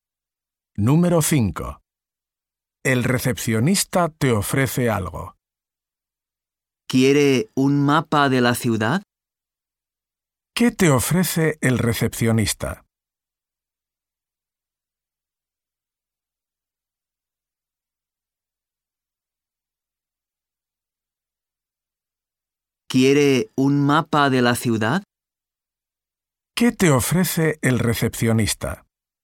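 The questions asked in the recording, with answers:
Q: ¿Qué te ofrece el recepcionista?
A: Un mapa de la ciudad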